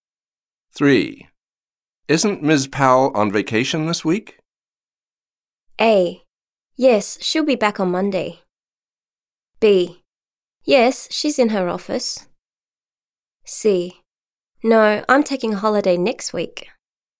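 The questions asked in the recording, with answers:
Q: Isn't Ms. Powell on vacation this week?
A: A: Yes, she'll be back on Monday.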